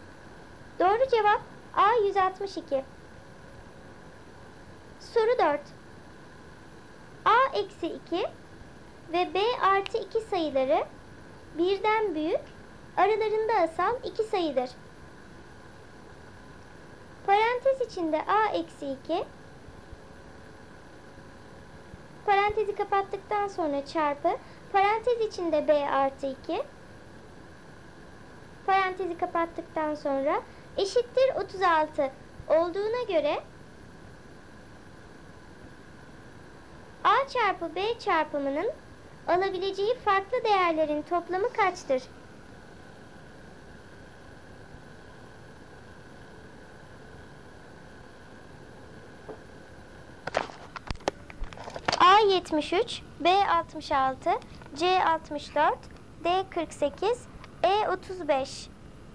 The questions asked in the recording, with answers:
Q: A çarpı B çarpımının alabileceği farklı değerlerin toplamı kaçtır?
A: Doğru cevap C 64.